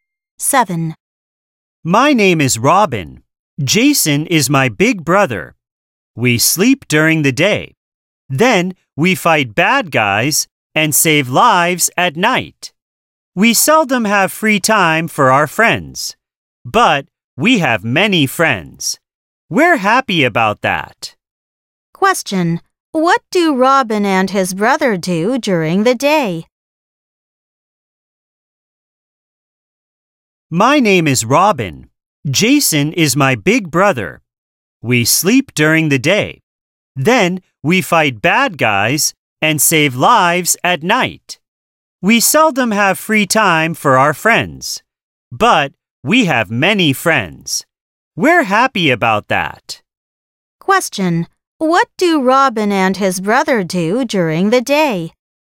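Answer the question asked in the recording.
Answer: They sleep.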